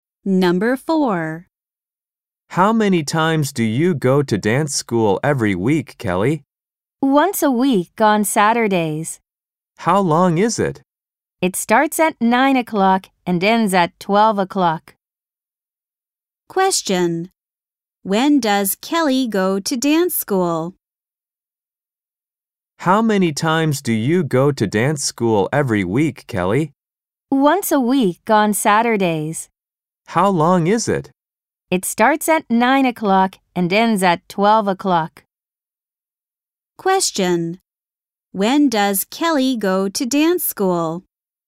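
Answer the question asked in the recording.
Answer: On Saturdays, from 9 to 12 o'clock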